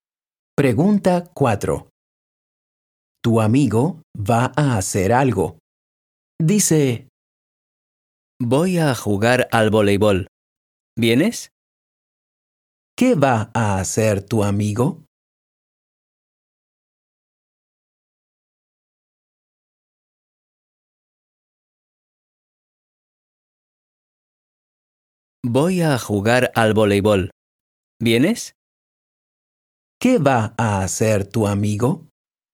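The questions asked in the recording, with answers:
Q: ¿Qué va a hacer tu amigo?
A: Jugar al voleibol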